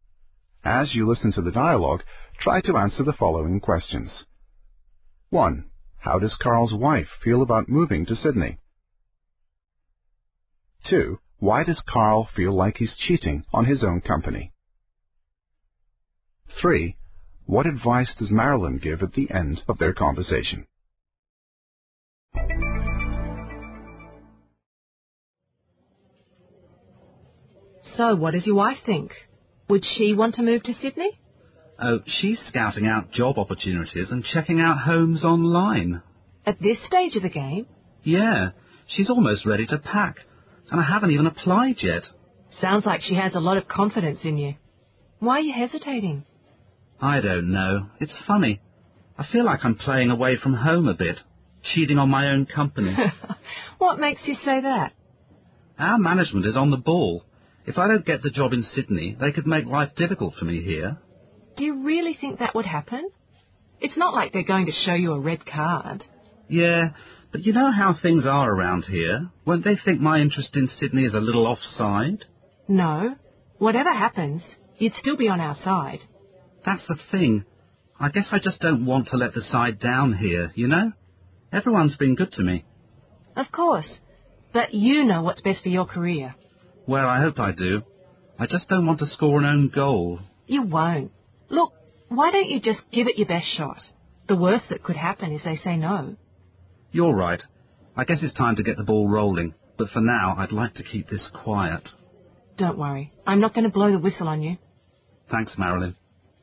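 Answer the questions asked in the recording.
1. Carl's wife is excited about moving.
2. Because he's thinking of applying for another job in the company, and management might make life difficult for him if he doesn't get it.
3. To give it his best shot and apply; the worst that could happen is they say no.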